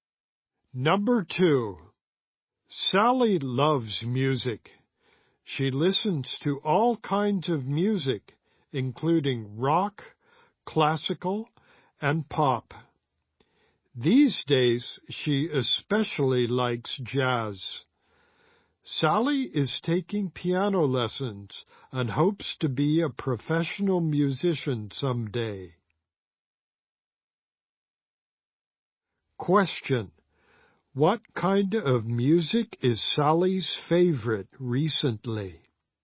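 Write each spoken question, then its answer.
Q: What kind of music is Sally's favorite recently?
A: Jazz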